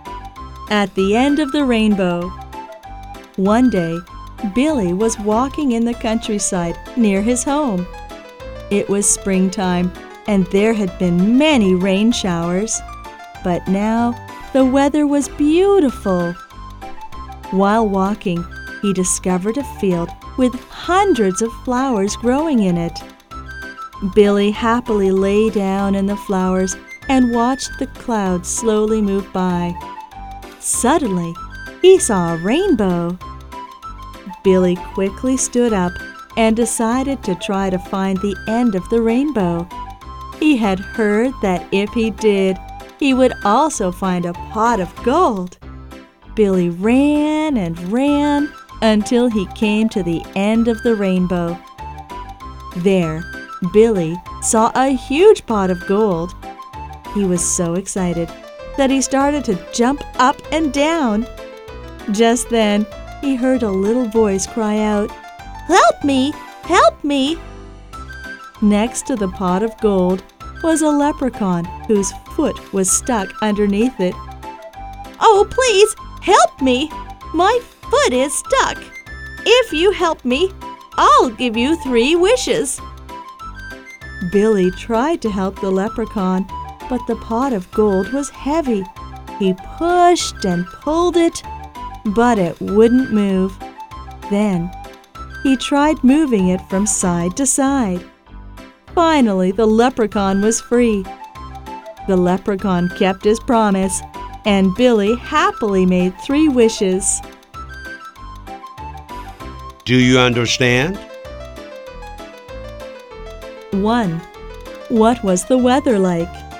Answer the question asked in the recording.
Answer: It was beautiful.